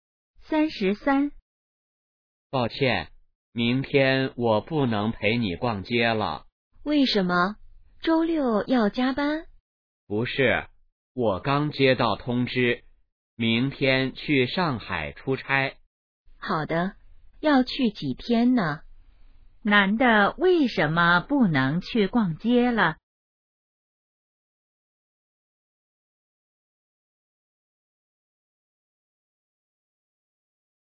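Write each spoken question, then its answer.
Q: 男的为什么不能去逛街了?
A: 要去上海出差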